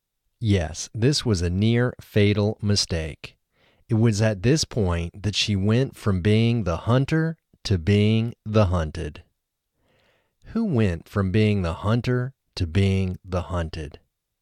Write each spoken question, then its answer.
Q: Who went from being the hunter to being the hunted?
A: Joanne went from being the hunter to being the hunted.